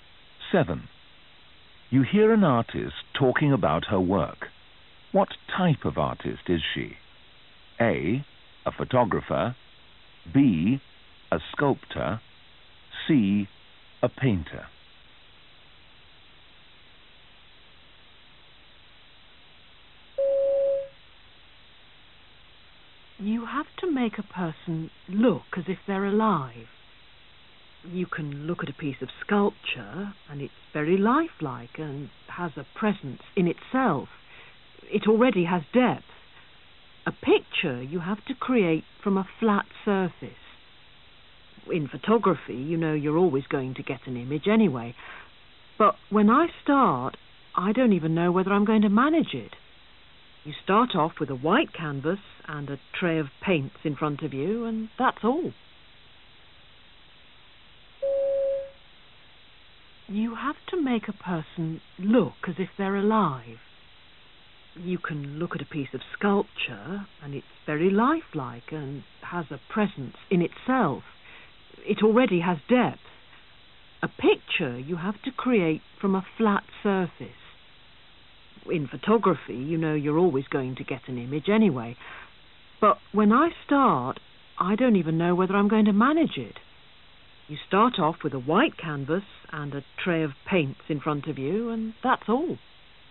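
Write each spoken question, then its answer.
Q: What type of artist is she?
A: C: A painter.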